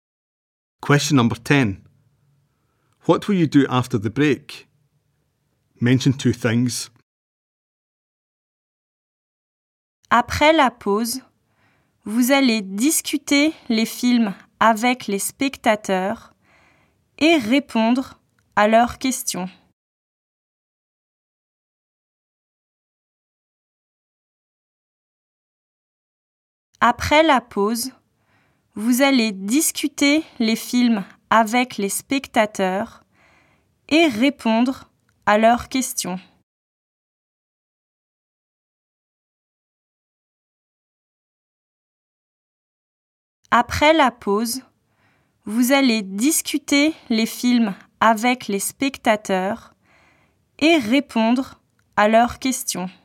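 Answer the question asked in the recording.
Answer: Discuss the films with the audience and answer their questions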